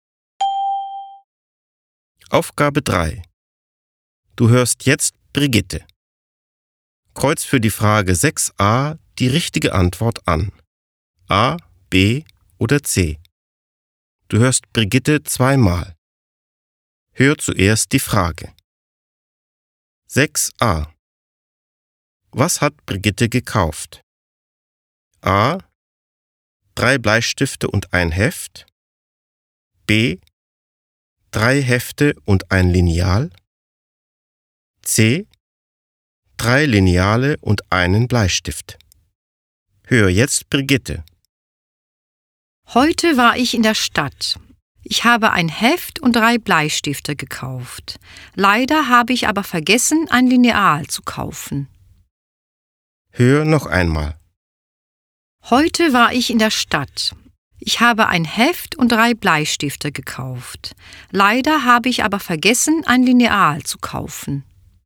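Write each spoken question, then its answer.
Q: Was hat Brigitte gekauft?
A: A: Drei Bleistifte und ein Heft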